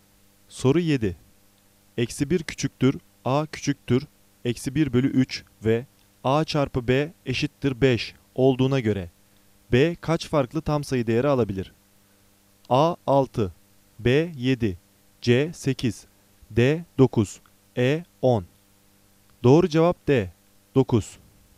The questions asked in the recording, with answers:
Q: Eksi 1 küçüktür A küçüktür Eksi 1 bölü 3 ve A çarpı B eşittir 5 olduğuna göre B kaç farklı tam sayı değeri alabilir?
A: Doğru cevap D 9.